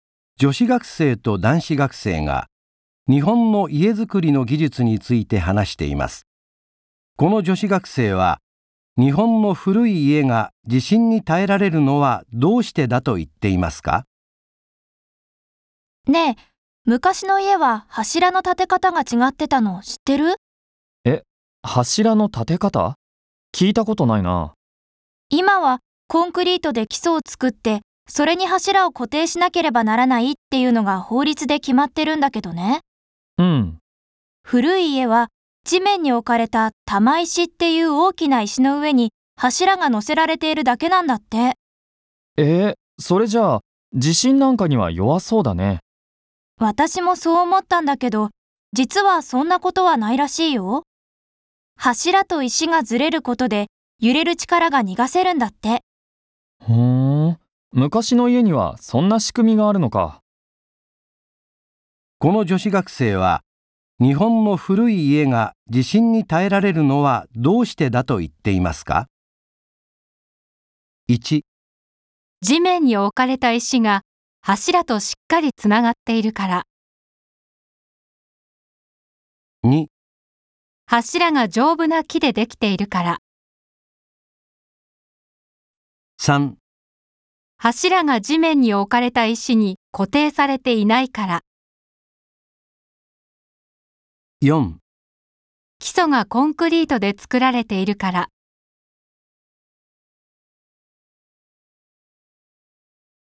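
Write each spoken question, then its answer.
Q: この女子学生は、日本の古い家が地震に耐えられるのはどうしてだと言っていますか?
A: 3: 柱が地面に置かれた石に固定されていないから。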